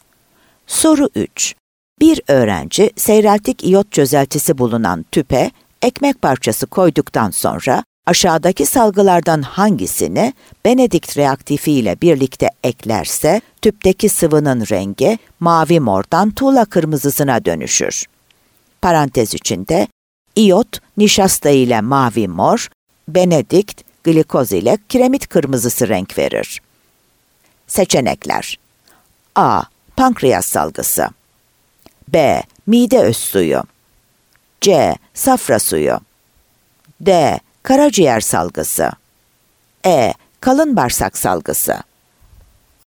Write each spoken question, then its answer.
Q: Bir öğrenci seyreltik iyot çözeltisi bulunan tüpe ekmek parçası koyduktan sonra aşağıdaki salgılardan hangisini Benedict reaktifi ile birlikte eklerse tüpteki sıvının rengi mavi mordan tuğla kırmızısına dönüşür.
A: Adana